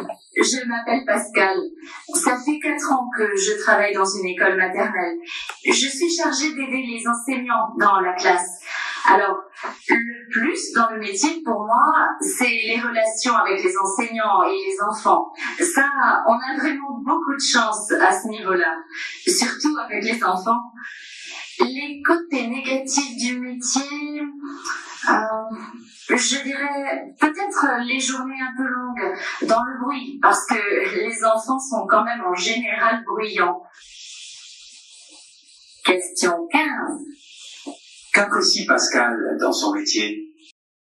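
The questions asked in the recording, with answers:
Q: Qu'apprécie Pascal dans son métier ?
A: Les relations avec les enseignants et les enfants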